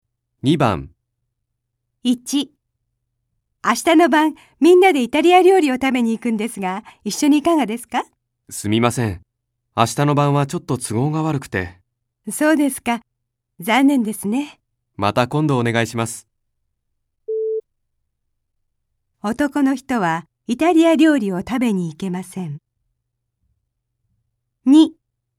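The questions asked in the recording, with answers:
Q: 男の人はイタリア料理を食べに行けません。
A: ○(正しい)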